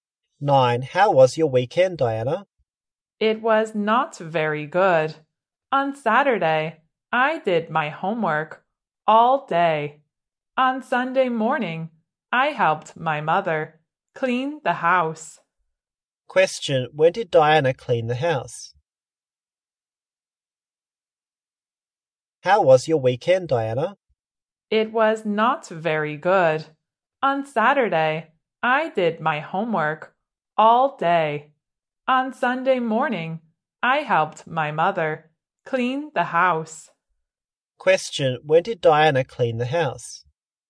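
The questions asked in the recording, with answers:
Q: when did Diana clean the house?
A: On Sunday morning.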